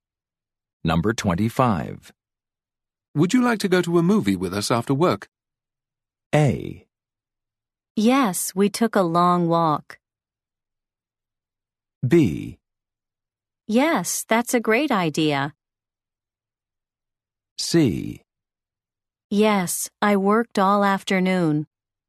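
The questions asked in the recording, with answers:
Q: Would you like to go to a movie with us after work?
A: B: Yes, that's a great idea.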